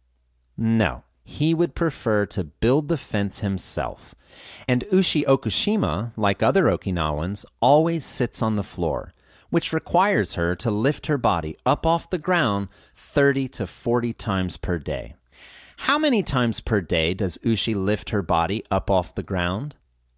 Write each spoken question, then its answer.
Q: How many times per day does Ushi lift her body up off the ground?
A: She lifts her body up off the ground 30 to 40 times per day.